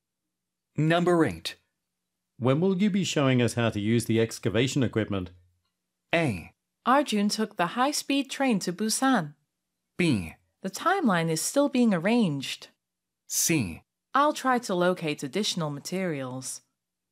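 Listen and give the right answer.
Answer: B: The timeline is still being arranged.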